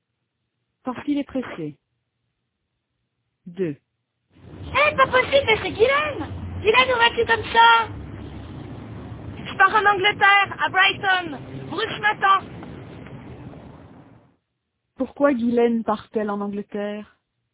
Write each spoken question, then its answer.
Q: Pourquoi Guylaine part-elle en Angleterre?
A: Parce que Bruce l'attend.